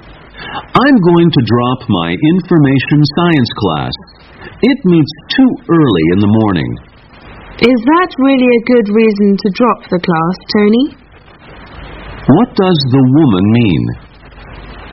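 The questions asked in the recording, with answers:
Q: What does the woman mean?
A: Meeting early in the morning isn't a good enough reason to drop the class.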